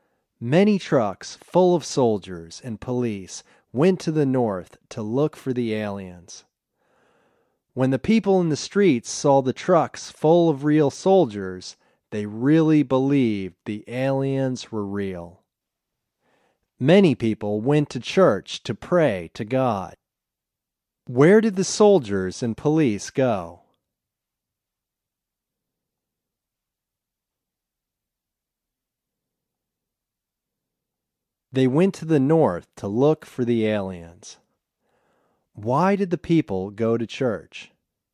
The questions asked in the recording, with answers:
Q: Why did the people go to church?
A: They went to church to pray to God.